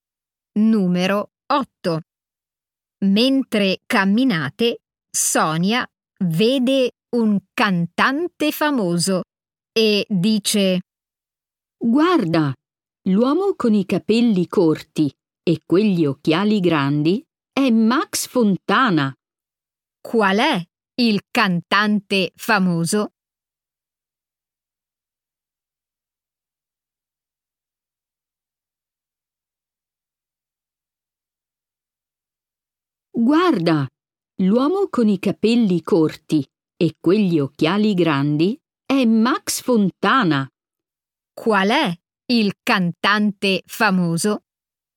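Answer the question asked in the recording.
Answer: l'uomo con i capelli corti e gli occhiali grandi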